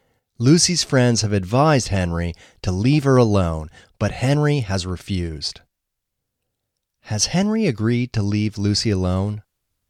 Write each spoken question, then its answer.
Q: Has Henry agreed to leave Lucy alone?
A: No, Henry has refused to leave her alone.